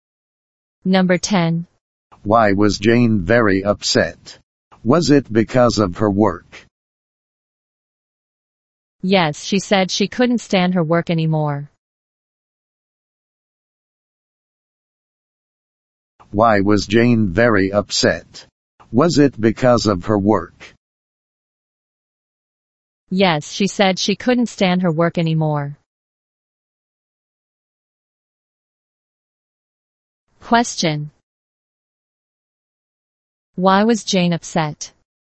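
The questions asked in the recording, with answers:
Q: Why was Jane upset?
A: Because of her work; she couldn't stand it anymore.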